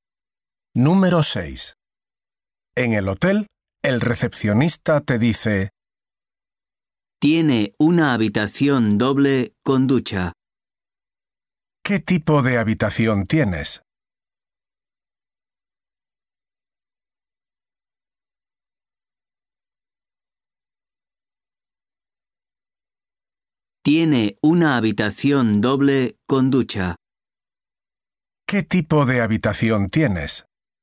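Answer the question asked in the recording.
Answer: Una habitación doble con ducha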